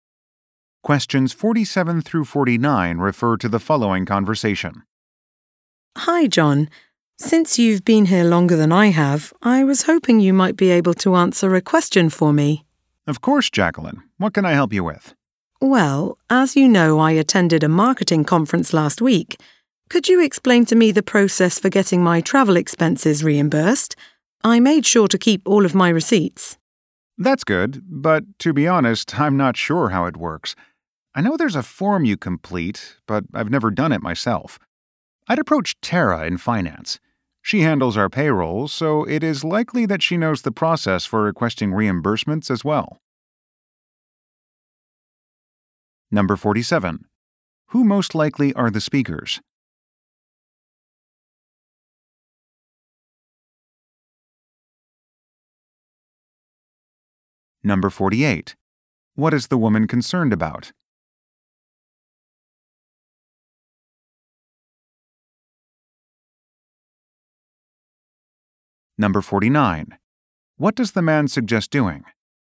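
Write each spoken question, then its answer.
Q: Who most likely are the speakers?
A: Coworkers

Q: What is the woman concerned about?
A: Getting her travel expenses reimbursed

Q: What does the man suggest doing?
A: Asking Tara in finance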